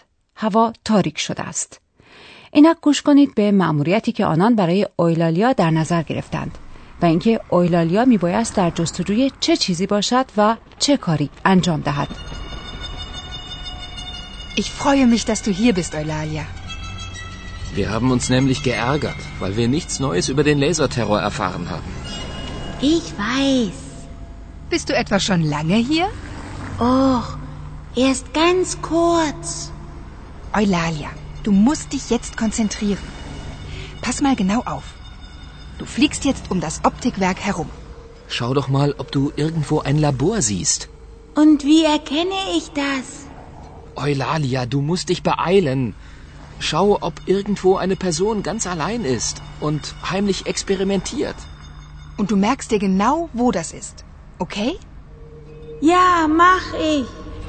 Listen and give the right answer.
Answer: اویلالیا باید دور مجتمع صنعتی عدسی سازی پرواز کند.